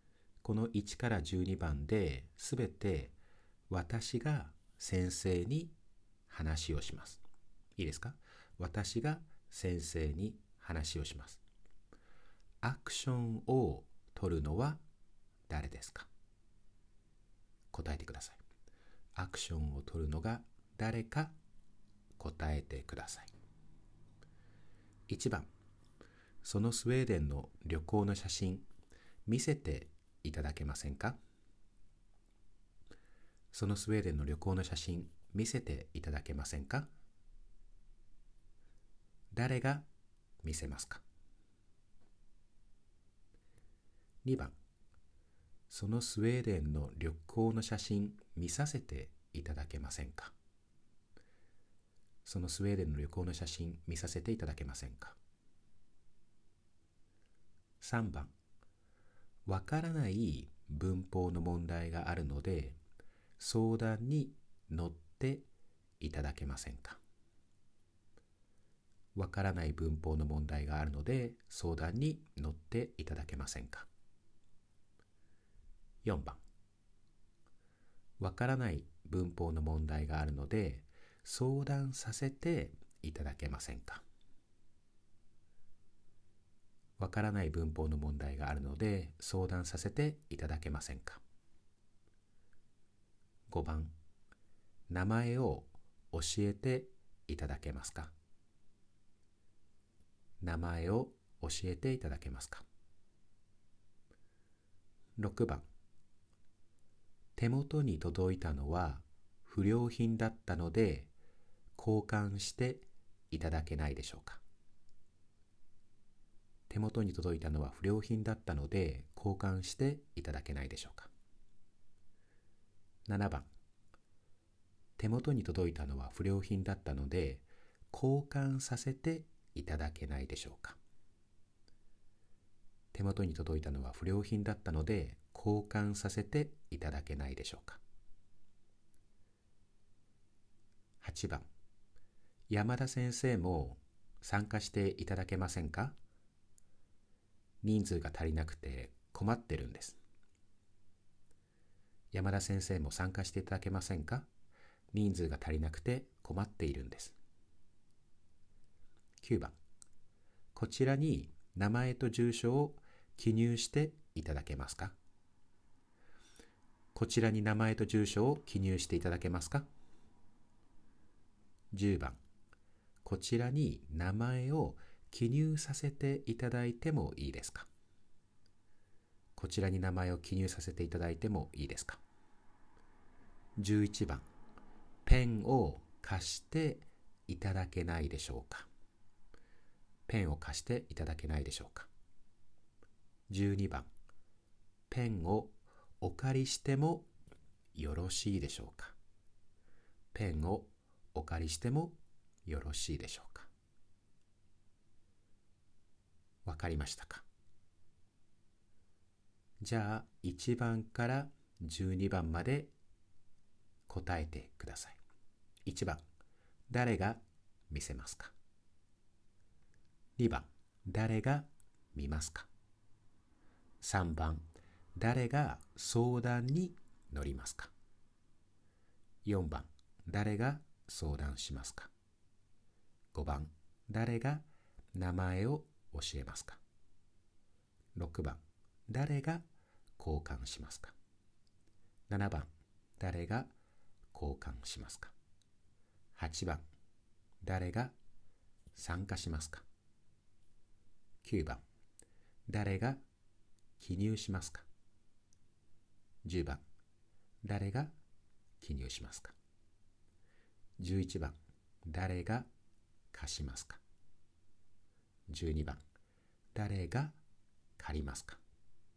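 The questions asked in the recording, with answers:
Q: 誰が見せますか?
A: 先生

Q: 誰が相談に乗りますか?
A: 先生

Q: 誰が名前を教えますか?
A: 先生

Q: 誰が交換しますか?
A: 先生

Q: 誰が参加しますか?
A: 山田先生

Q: 誰が記入しますか?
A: 先生

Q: 誰が貸しますか?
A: 先生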